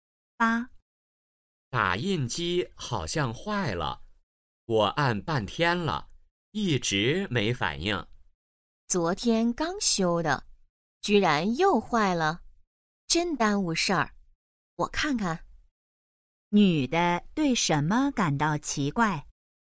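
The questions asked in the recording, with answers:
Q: 女的对什么感到奇怪?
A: 打印机刚修好又坏了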